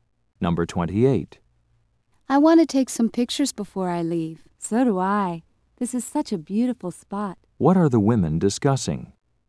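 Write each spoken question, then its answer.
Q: What are the women discussing?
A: Taking pictures of a beautiful place.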